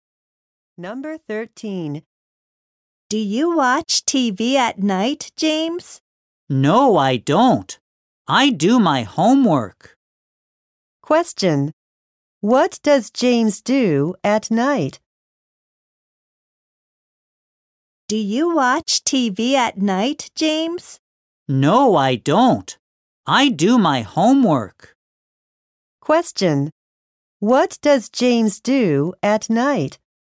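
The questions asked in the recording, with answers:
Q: What does James do at night?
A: He does his homework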